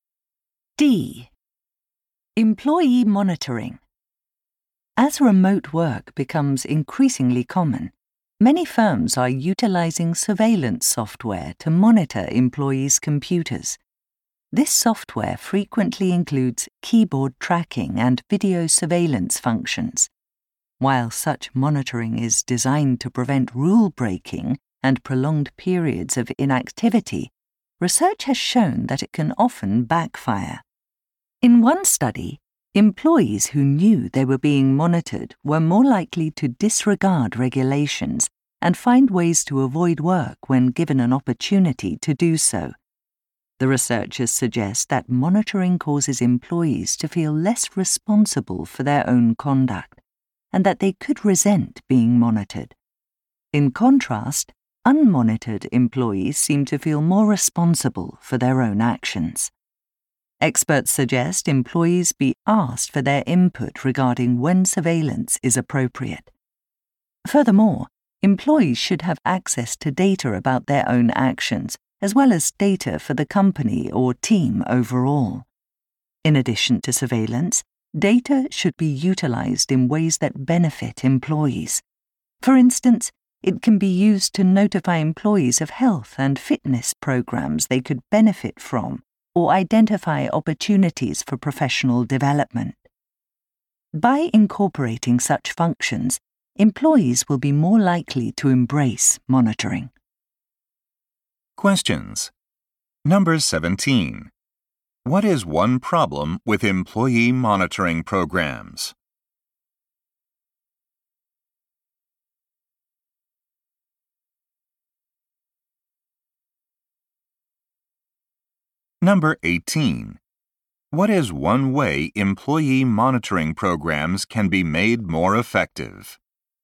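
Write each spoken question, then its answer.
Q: What is one problem with employee monitoring programs?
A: Monitored employees are more likely to break rules and avoid work

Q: What is one way employee monitoring programs can be made more effective?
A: Ask employees for input and use data in ways that benefit them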